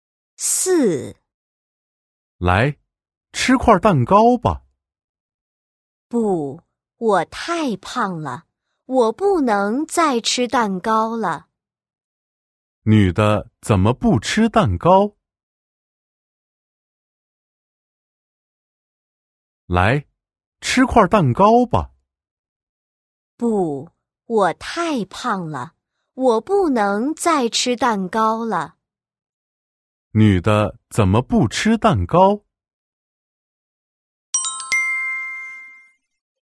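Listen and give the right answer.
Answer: 她太胖了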